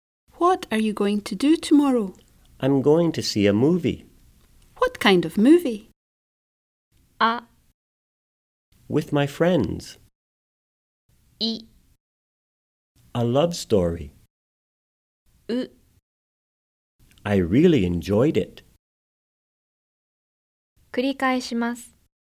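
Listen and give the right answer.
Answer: I: A love story.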